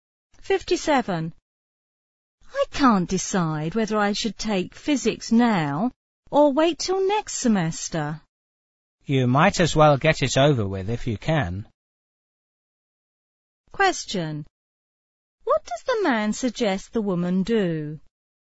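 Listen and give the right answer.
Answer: Take physics now.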